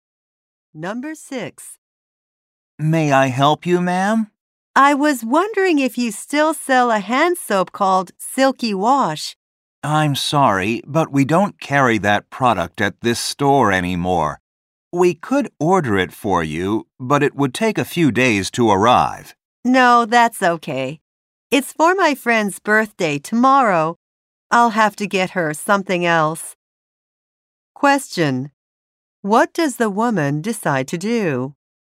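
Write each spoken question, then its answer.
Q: What does the woman decide to do?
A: Get her friend a different present.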